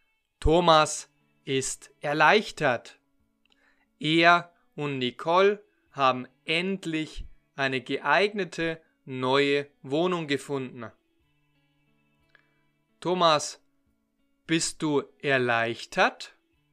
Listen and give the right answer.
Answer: ja, ich bin erleichtert.